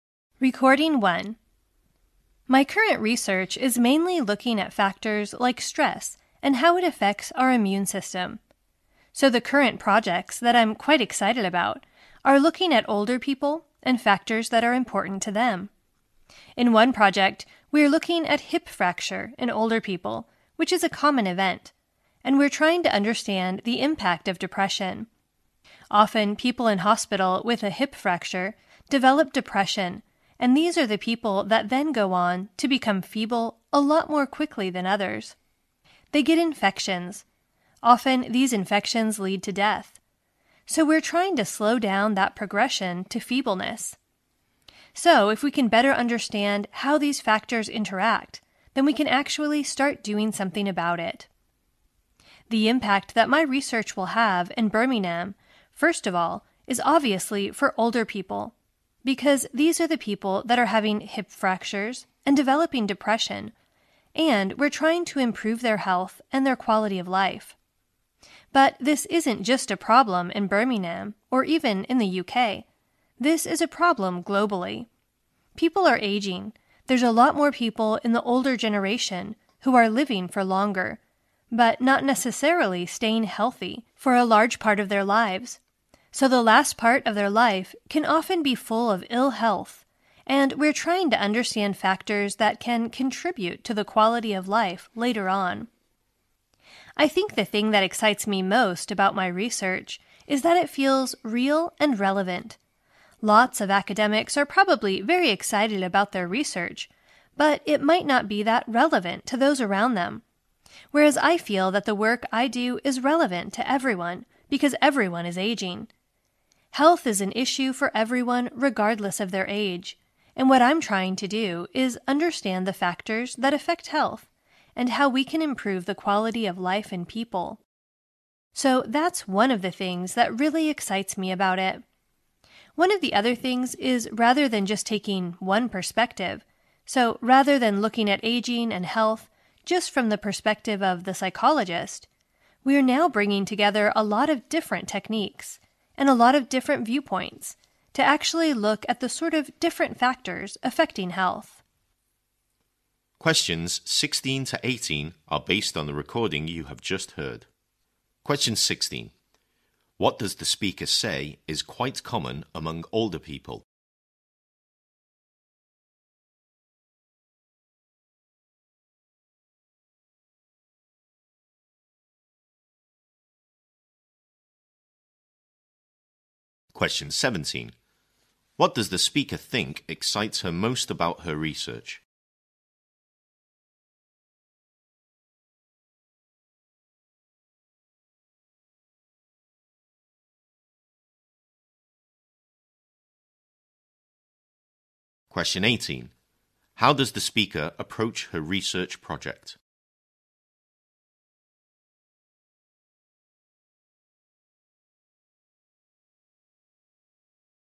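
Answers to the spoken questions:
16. Hip fracture.
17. It feels real and relevant.
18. By bringing together different techniques and viewpoints rather than one perspective.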